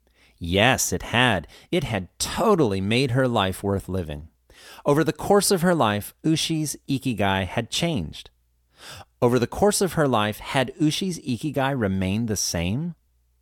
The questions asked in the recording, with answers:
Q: Over the course of her life, had Ushi's ikigai remained the same?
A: No, it hadn't. Ushi's ikigai had changed.